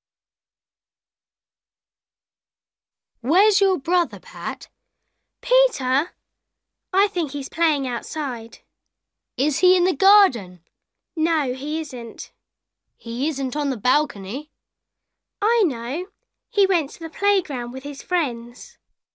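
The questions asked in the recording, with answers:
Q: Where's Peter?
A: At the playground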